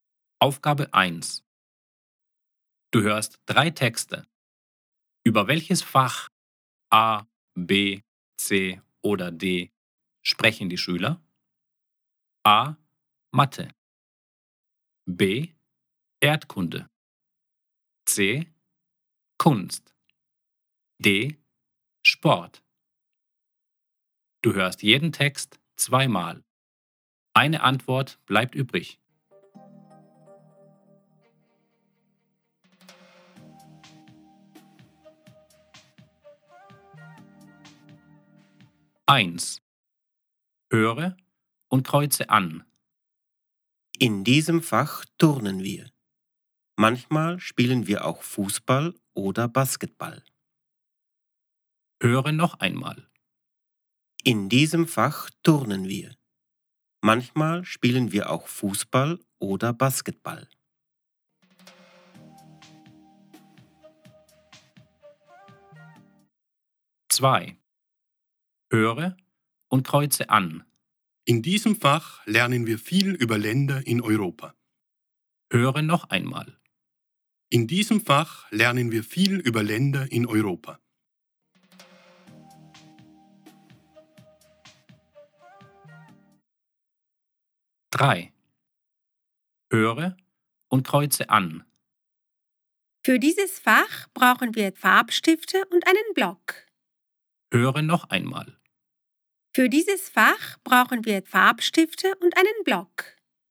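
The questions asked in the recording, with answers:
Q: Über welches Fach A, B, C oder D sprechen die Schüler?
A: D: Sport

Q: Über welches Fach A, B, C oder D sprechen die Schüler?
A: B: Erdkunde

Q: Über welches Fach A, B, C oder D sprechen die Schüler?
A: C: Kunst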